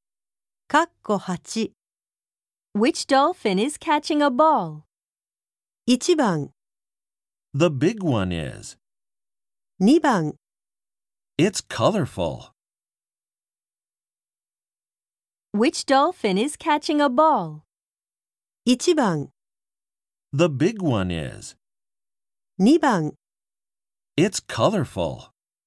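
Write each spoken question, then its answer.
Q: Which dolphin is catching a ball?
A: 1: The big one is.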